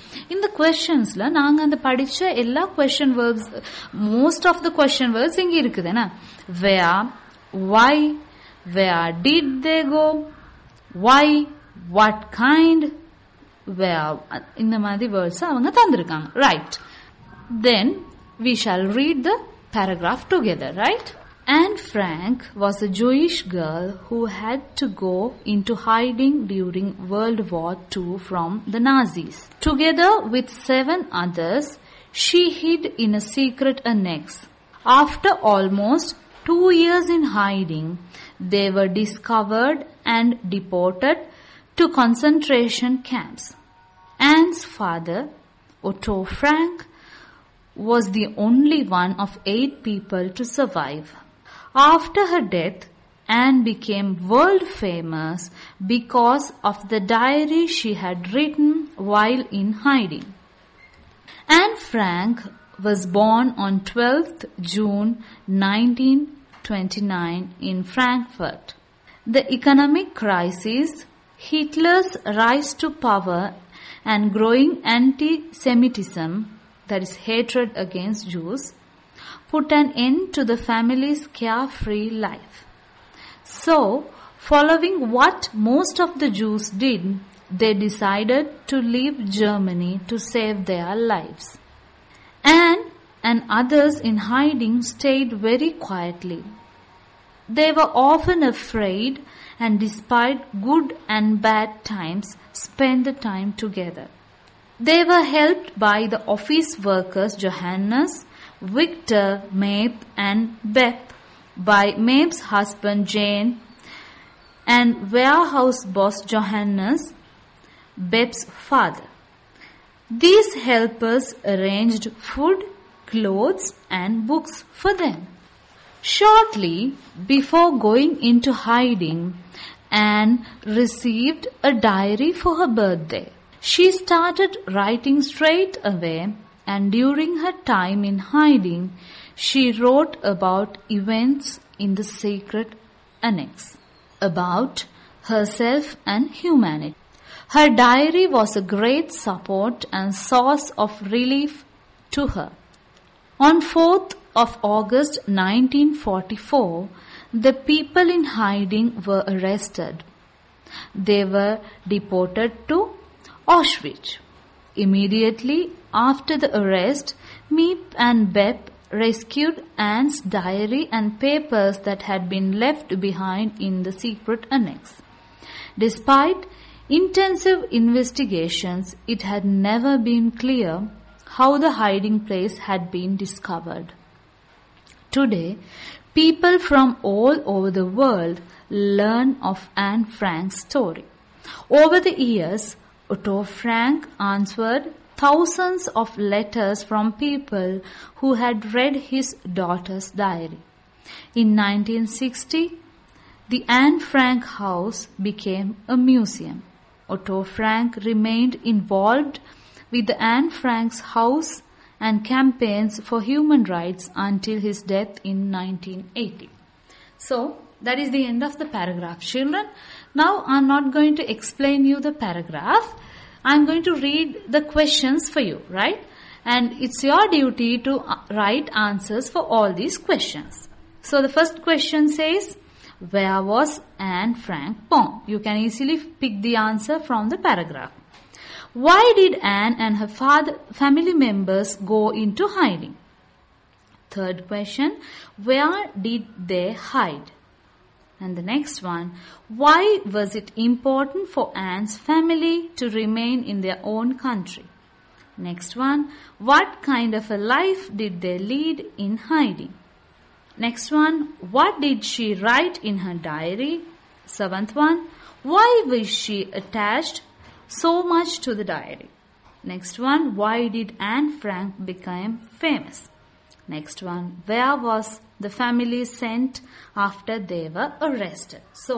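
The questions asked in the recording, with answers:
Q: where was Anne Frank born?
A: In Frankfurt

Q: Why did Anne and her family members go into hiding?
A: To hide from the Nazis because they were Jewish

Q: where did they hide?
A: In a secret annex

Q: what kind of a life did they lead in hiding?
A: A very quiet life, often afraid, spending good and bad times together

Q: what did she write in her diary?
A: Events in the secret annex, herself and humanity

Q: why was she attached so much to the diary?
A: It was a great support and source of relief to her

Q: why did Anne Frank become famous?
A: Because of the diary she wrote while in hiding

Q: where was the family sent after they were arrested?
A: To Auschwitz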